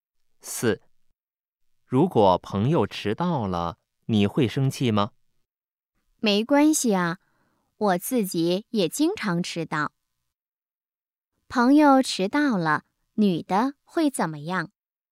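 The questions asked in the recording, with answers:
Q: 朋友迟到了,女的会怎么样?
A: 不会生气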